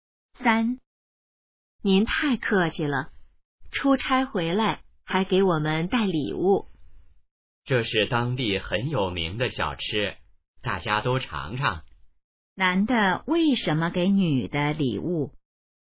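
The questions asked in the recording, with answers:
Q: 男的为什么给女的礼物?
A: 出差回来带的当地小吃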